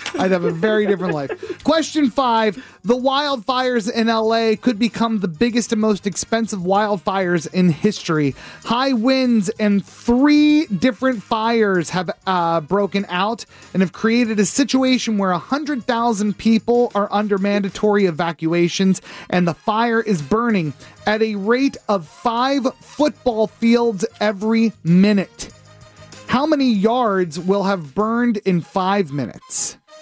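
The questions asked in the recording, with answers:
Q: How many yards will have burned in 5 minutes?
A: 2,500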